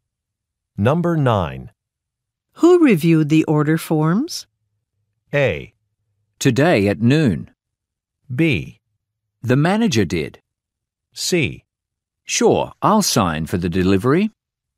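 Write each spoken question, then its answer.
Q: Who reviewed the order forms?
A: B: The manager did.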